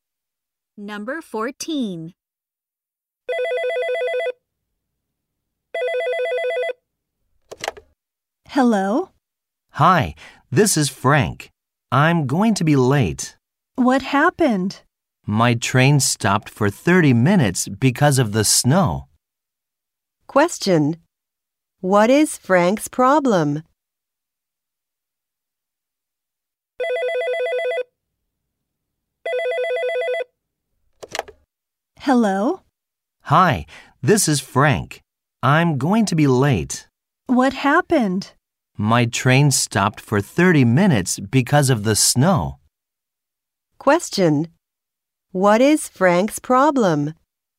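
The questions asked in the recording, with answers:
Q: What is Frank's problem?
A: His train stopped because of the snow.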